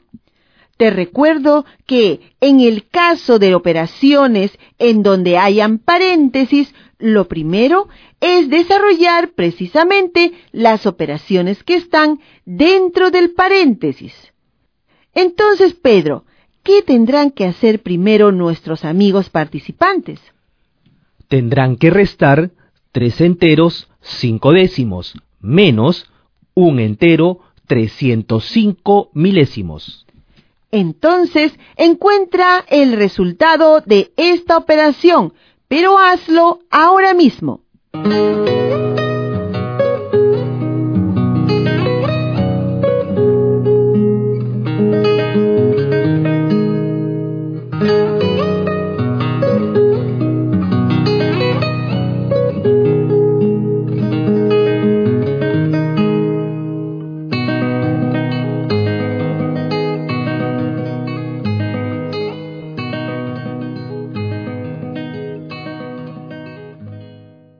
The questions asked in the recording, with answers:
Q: Entonces, encuentra el resultado de esta operación, pero hazlo ahora mismo.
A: el resultado de la resta es 2 enteros 195 milésimos